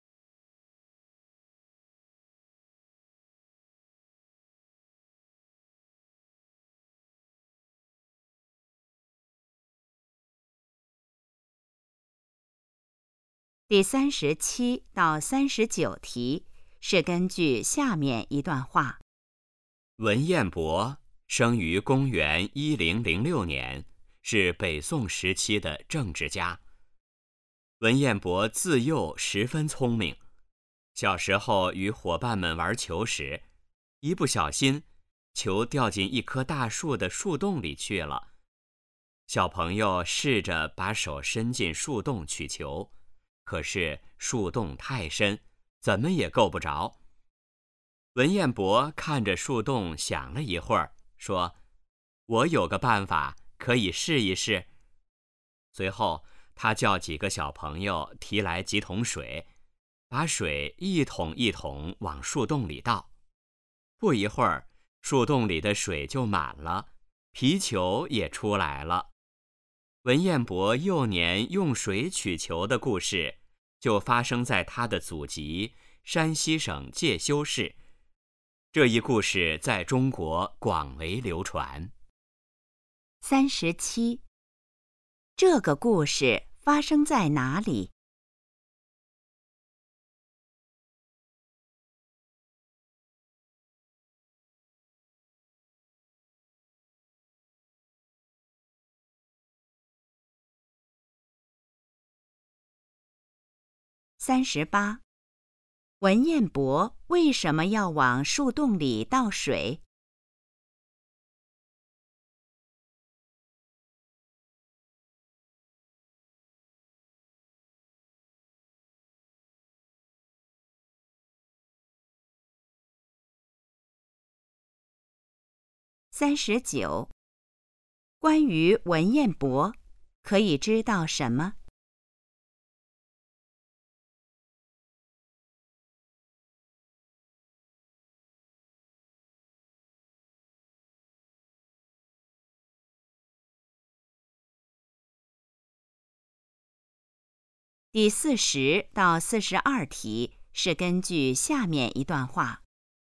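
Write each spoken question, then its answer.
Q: 这个故事发生在哪里?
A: 山西省介休市

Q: 文彦博为什么要往树洞里倒水?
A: 让球浮出来

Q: 关于文彦博,可以知道什么?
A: 他从小很聪明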